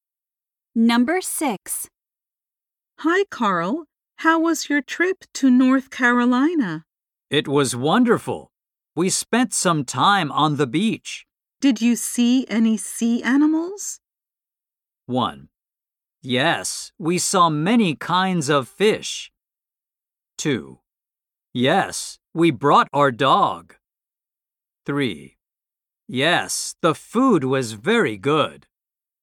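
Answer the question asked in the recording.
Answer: 1: Yes, we saw many kinds of fish.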